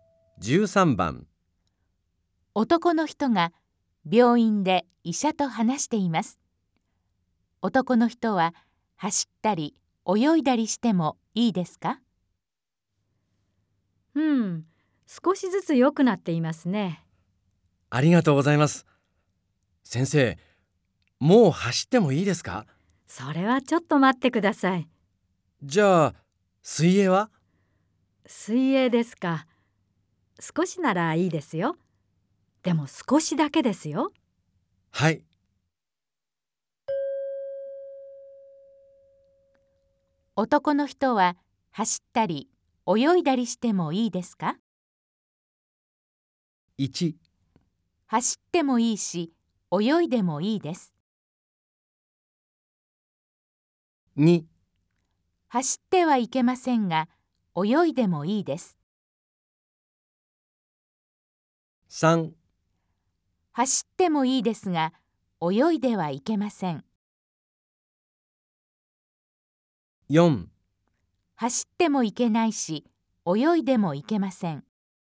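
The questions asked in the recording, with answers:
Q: 男の人は走ったり泳いだりしてもいいですか?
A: 2: 走ってはいけませんが泳いでもいいです。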